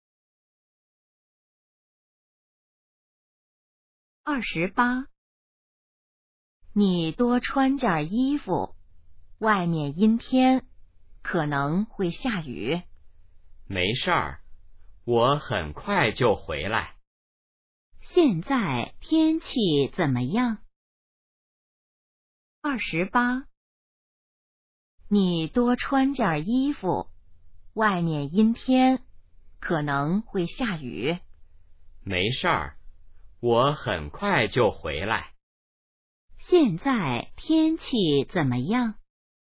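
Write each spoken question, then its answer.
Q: 现在天气怎么样?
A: 阴天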